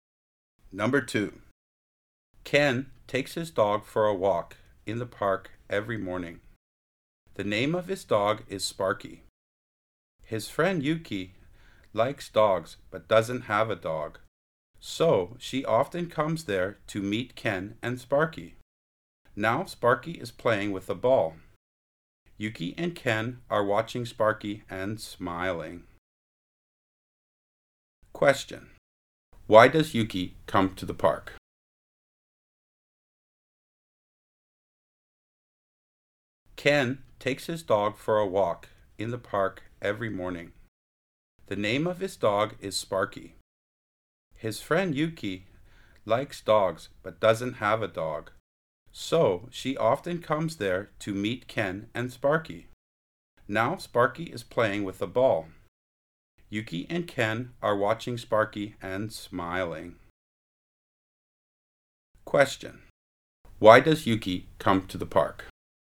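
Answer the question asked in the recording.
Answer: To meet Ken and his dog Sparky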